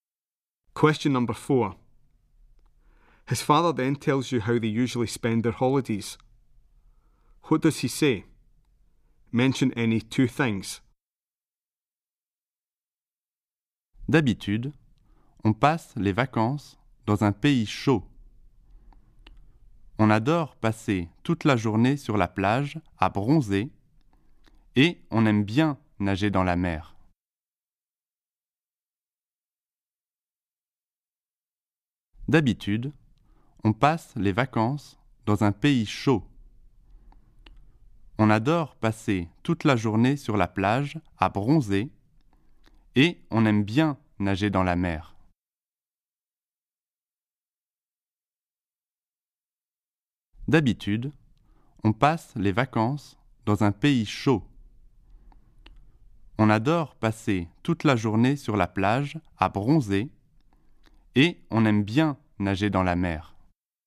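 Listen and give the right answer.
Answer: They usually holiday in a hot country; they love spending all day sunbathing on the beach; they like swimming in the sea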